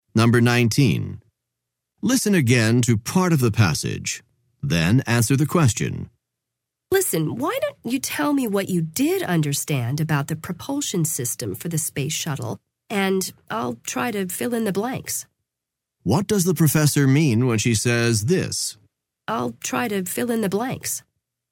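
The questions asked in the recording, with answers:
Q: What does the professor mean when she says this?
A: She will explain the parts of the propulsion system the student didn't understand.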